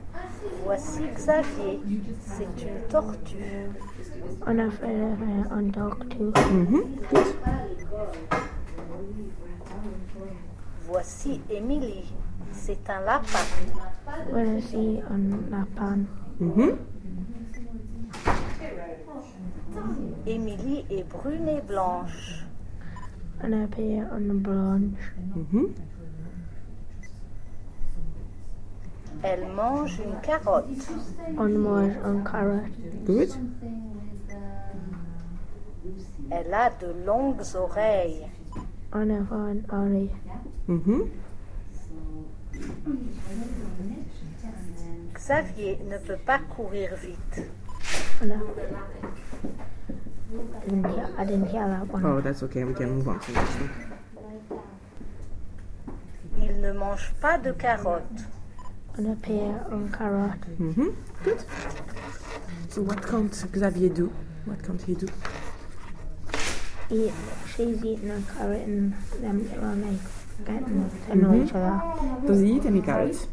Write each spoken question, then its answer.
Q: Does he eat any carrots?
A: No.